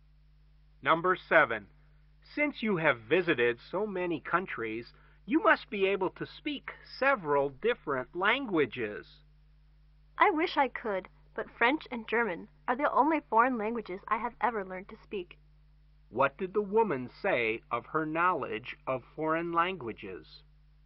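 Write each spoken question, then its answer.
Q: What did the woman say of her knowledge of foreign languages?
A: She speaks only French and German.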